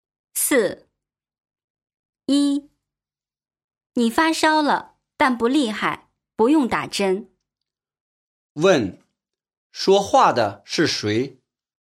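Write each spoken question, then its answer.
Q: 说话的是谁?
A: 医生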